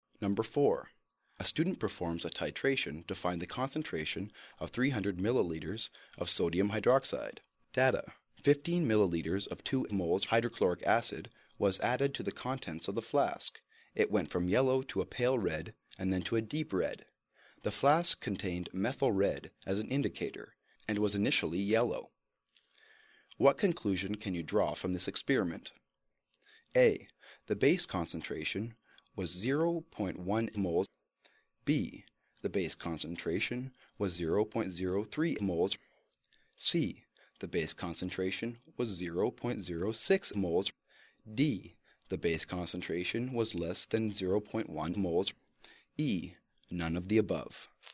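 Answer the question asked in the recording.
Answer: D: The base concentration was less than 0.1 moles.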